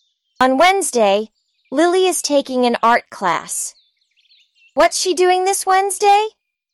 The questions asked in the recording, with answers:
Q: What's she doing this Wednesday?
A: She's taking an art class.